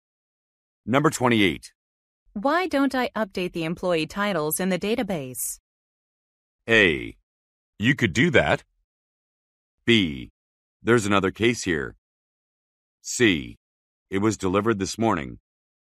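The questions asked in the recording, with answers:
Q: Why don't I update the employee titles in the database?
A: A: You could do that.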